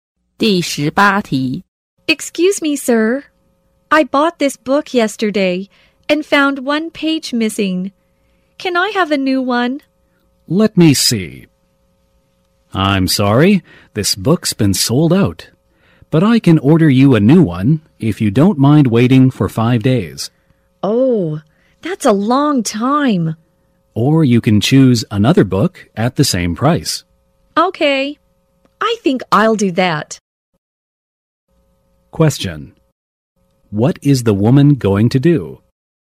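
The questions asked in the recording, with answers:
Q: What is the woman going to do?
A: Choose another book at the same price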